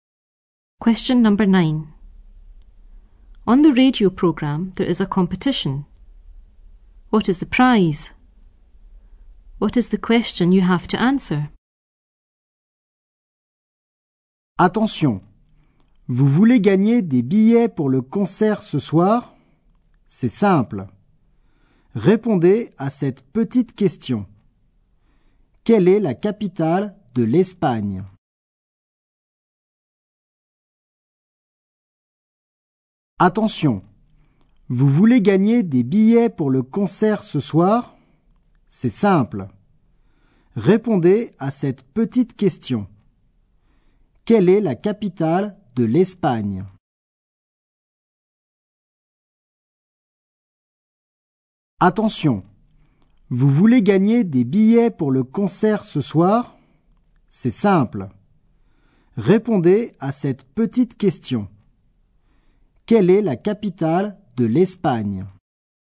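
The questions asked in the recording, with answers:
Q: What is the prize?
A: Tickets for the concert tonight

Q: What is the question you have to answer?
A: What is the capital of Spain?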